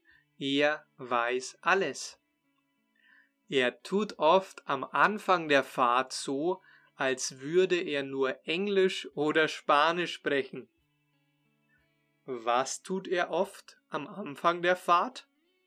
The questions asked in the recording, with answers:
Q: Was tut er oft am Anfang der Fahrt?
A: Er tut oft am Anfang der Fahrt so, als würde er nur Englisch oder Spanisch sprechen,